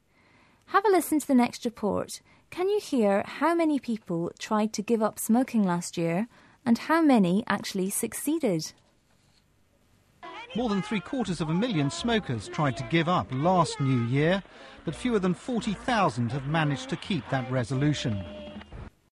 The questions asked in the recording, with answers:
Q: Can you hear how many people tried to give up smoking last year and how many actually succeeded?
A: Only about 5% of the smokers managed to keep their resolution.